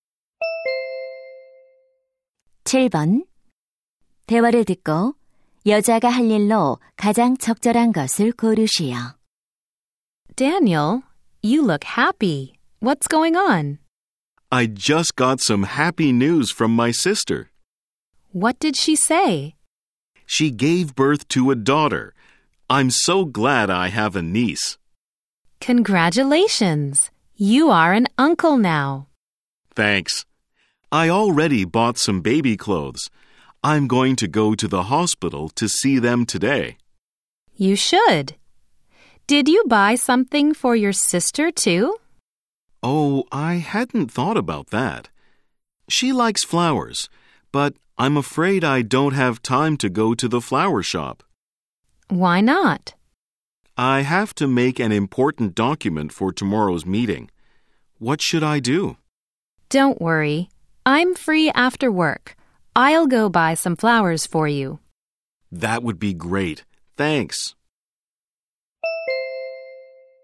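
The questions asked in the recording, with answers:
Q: 대화를 듣고 여자가 할 일로 가장 적절한 것을 고르시오.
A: 꽃 사러 가기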